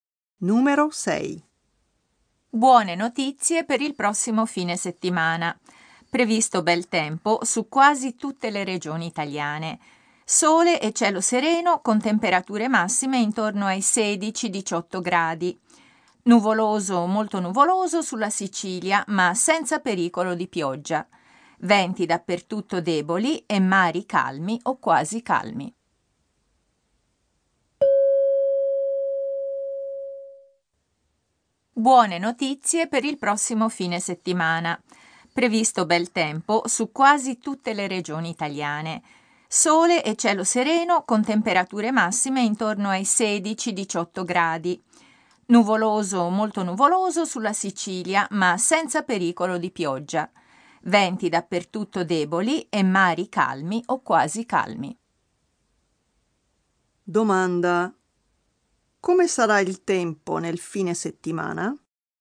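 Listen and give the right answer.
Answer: Bel tempo quasi ovunque: sole e cielo sereno, 16-18 gradi; nuvoloso sulla Sicilia ma senza pioggia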